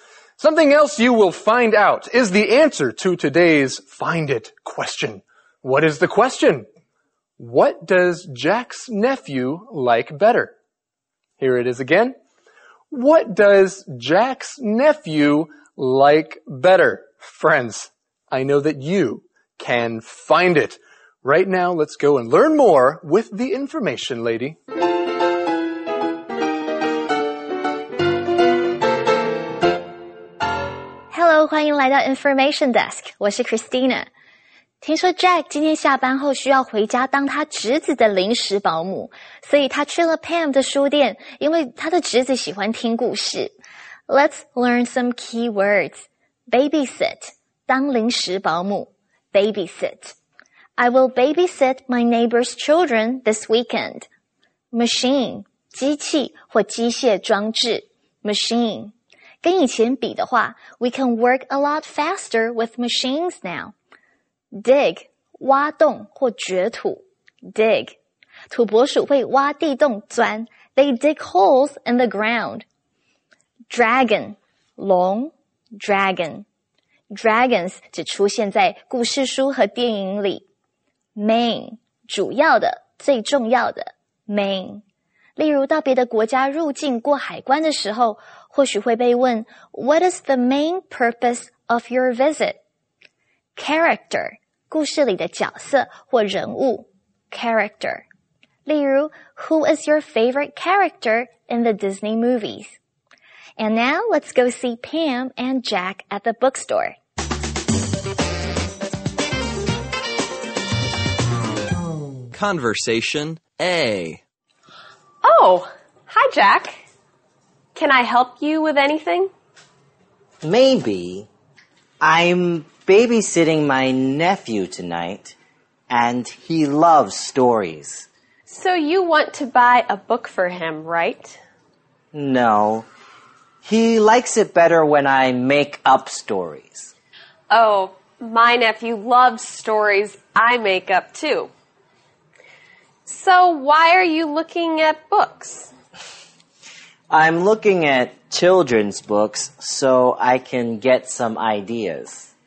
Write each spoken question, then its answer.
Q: What does Jack's nephew like better?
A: He likes it better when Jack makes up stories.